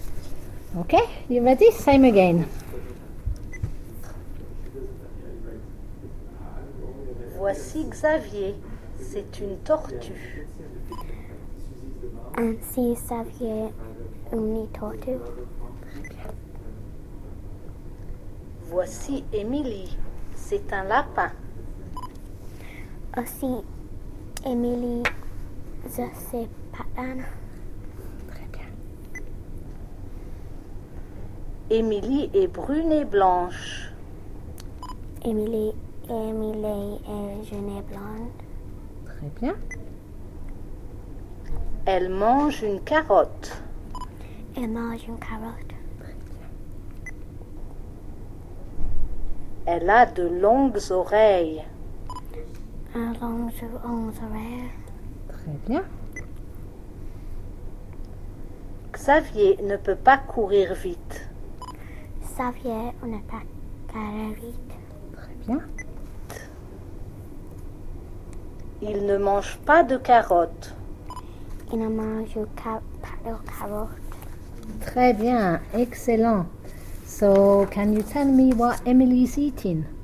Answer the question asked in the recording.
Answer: Carottes.